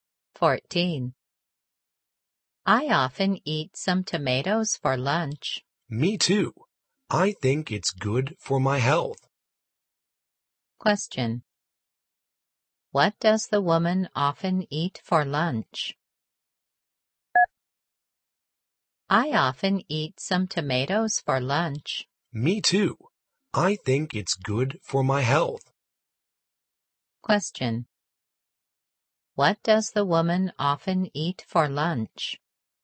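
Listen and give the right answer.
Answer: Tomatoes.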